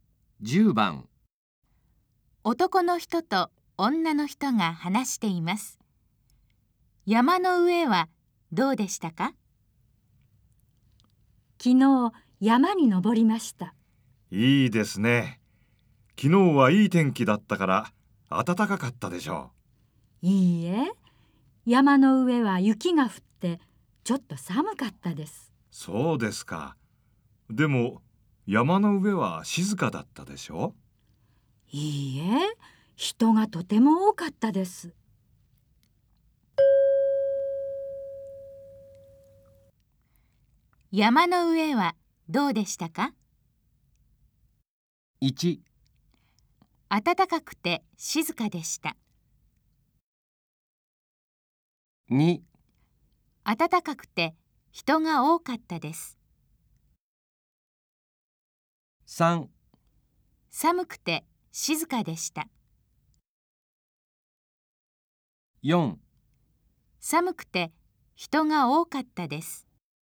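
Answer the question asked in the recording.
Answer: 4: 寒くて人が多かったです。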